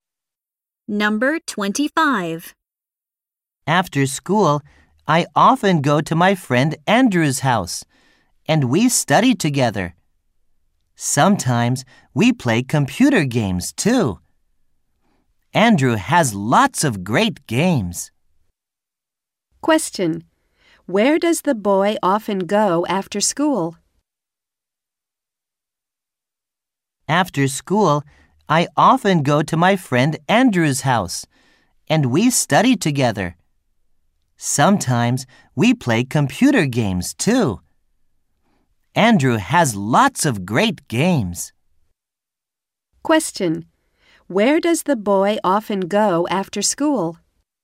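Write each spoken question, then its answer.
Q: Where does the boy often go after school?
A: To his friend Andrew's house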